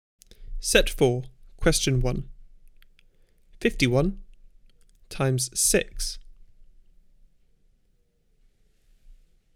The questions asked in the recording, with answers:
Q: 51 times 6.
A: Answer 306.